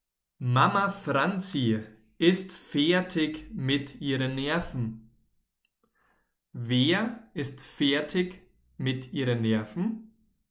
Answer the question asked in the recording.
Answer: Mama Franzi, genau. Mama Franzi ist fertig mit ihren Nerven.